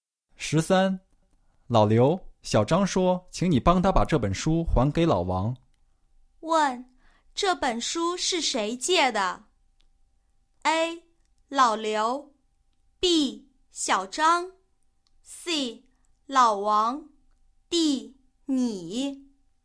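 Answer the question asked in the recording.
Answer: B: 小张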